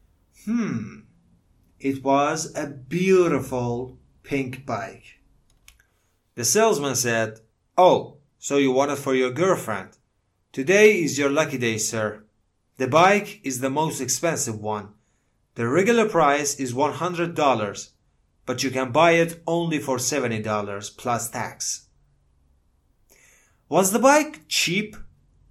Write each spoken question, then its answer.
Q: Was the bike cheap?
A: No. It wasn't cheap. It was really expensive.